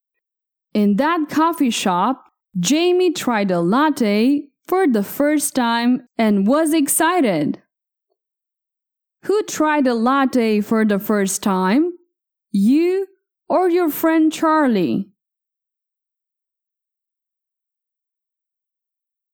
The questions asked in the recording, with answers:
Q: Who tried a latte for the first time?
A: I did. I tried a latte.